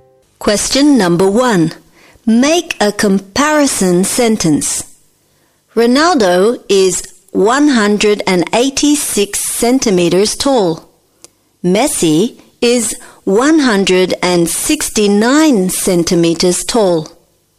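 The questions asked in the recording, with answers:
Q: Make a comparison sentence.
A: Ronaldo is taller than Messi.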